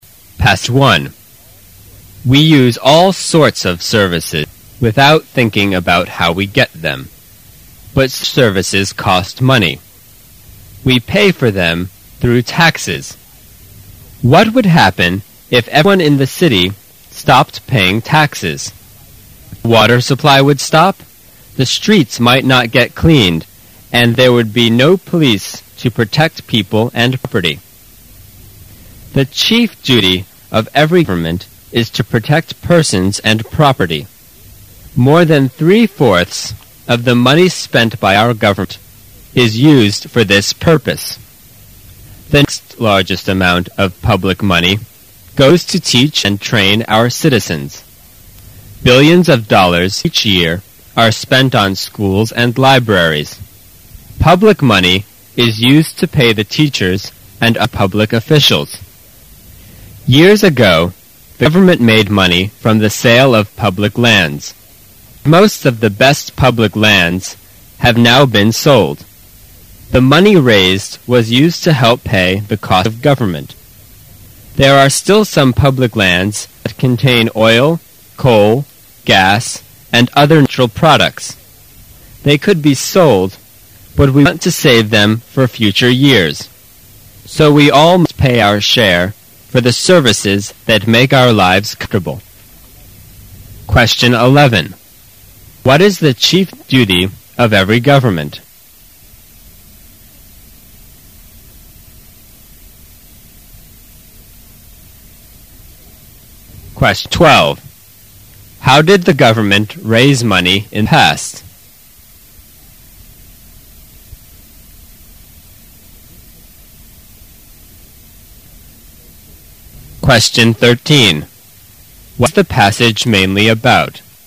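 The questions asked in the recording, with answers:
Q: What is the chief duty of every government?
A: To protect persons and property

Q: How did the government raise money in the past?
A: From the sale of public lands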